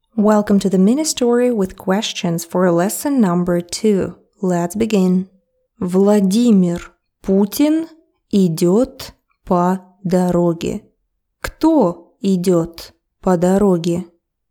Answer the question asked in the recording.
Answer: Владимир Путин, президент России.